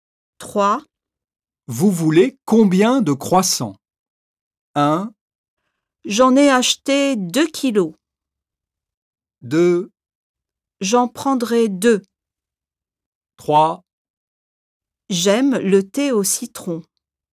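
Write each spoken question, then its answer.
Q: Vous voulez combien de croissants?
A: 2: J'en prendrai 2.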